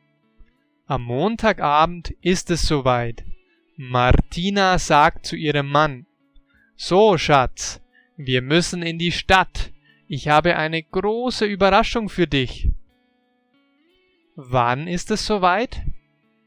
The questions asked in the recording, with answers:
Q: Wann ist es soweit?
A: Am Montagabend.